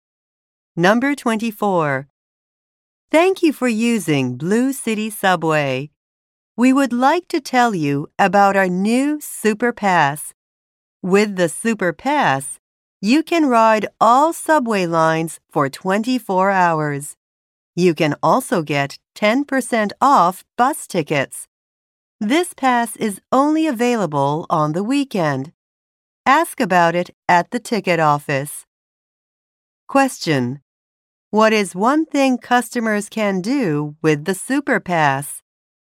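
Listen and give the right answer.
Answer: Ride all subway lines for 24 hours (and get 10% off bus tickets).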